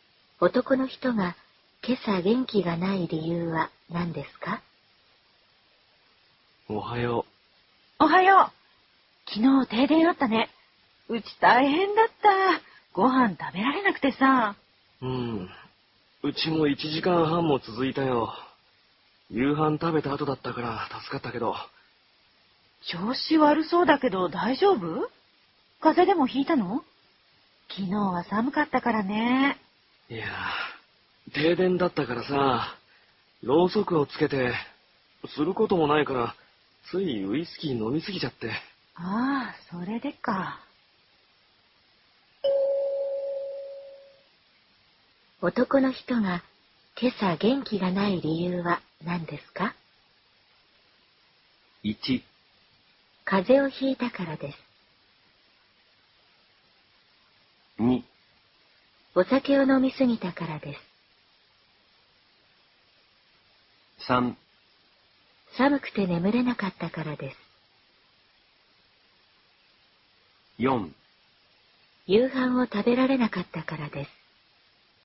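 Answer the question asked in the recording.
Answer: 2: お酒を飲みすぎたからです。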